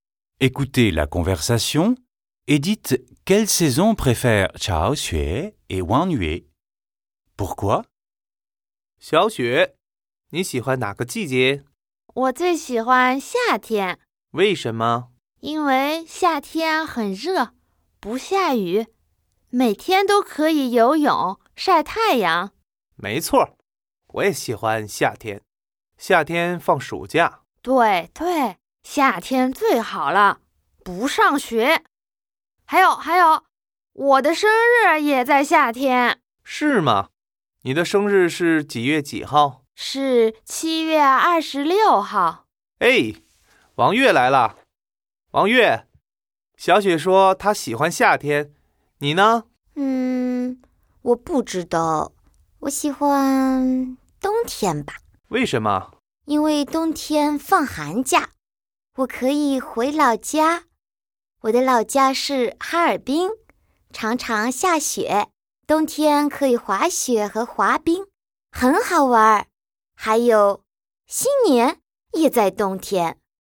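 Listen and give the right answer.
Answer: Xiao Xue préfère l'été (il fait chaud, elle peut nager, ce sont les vacances, son anniversaire est en été) ; Wang Yue préfère l'hiver (vacances d'hiver, retour à Harbin, ski et patin, Nouvel An)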